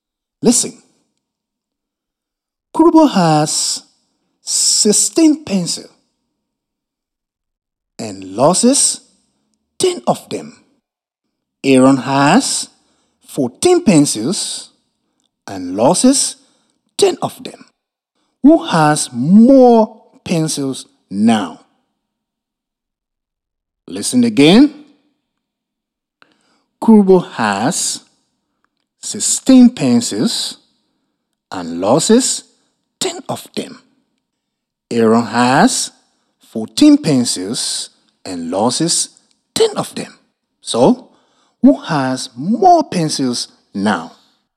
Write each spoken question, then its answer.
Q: So, who has more pencils now?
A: I think Kurobo has more pencils.